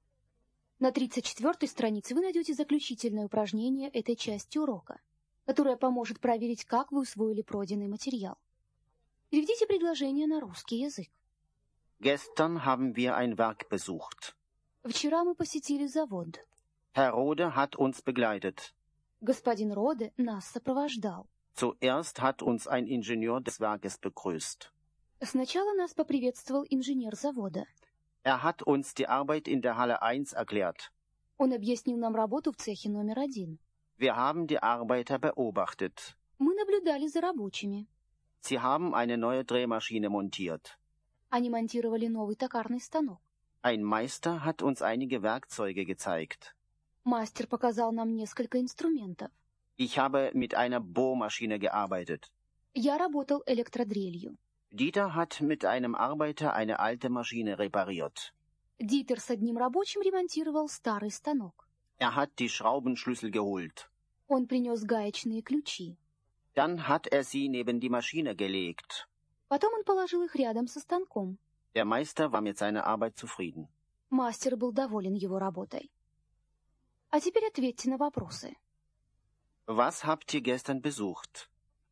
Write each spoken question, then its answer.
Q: Was habt ihr gestern besucht?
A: Wir haben ein Werk besucht.